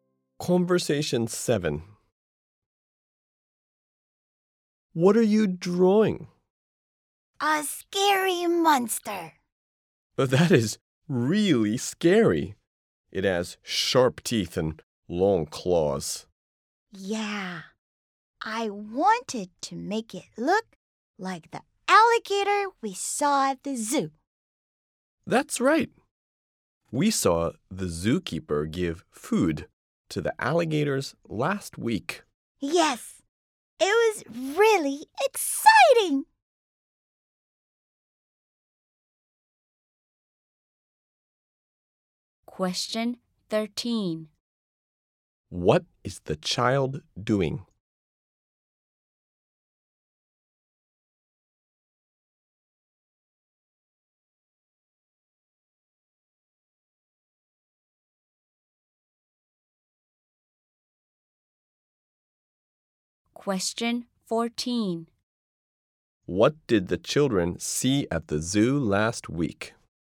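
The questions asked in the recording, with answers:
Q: What is the child doing?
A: Drawing a scary monster

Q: What did the children see at the zoo last week?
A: The zookeeper feeding the alligators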